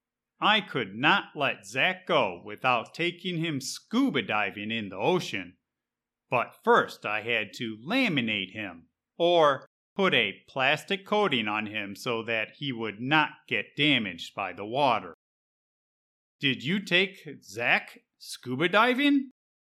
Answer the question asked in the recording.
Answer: Yep, I could not let Zack go without taking him scuba diving, so I laminated him and we swam with the fish.